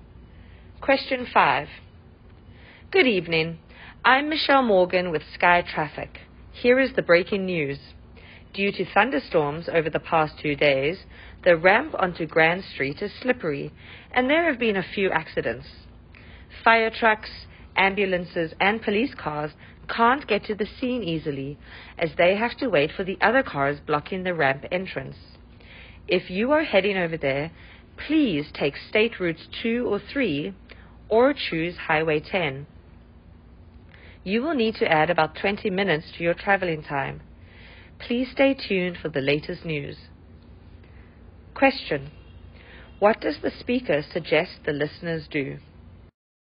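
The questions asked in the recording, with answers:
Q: What does the speaker suggest the listeners do?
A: Take a different route: State Routes 2 or 3, or Highway 10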